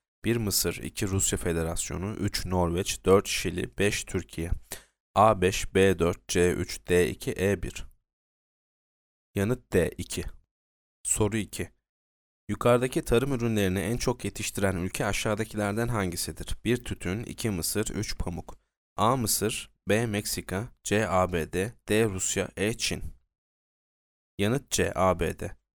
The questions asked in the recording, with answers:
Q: Yukarıdaki tarım ürünlerini en çok yetiştiren ülke aşağıdakilerden hangisidir?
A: Yanıt C. ABD.